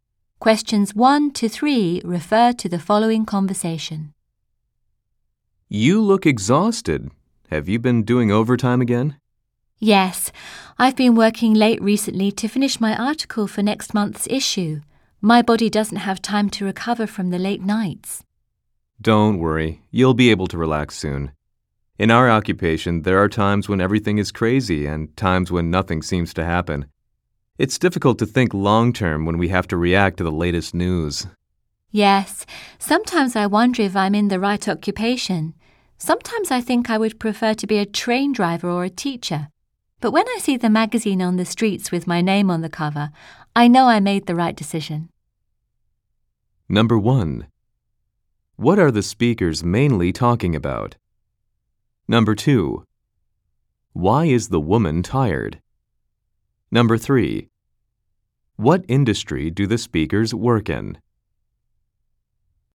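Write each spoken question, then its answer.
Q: Why is the woman tired?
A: She has been working late to finish her article

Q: What industry do the speakers work in?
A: Magazine publishing (journalism)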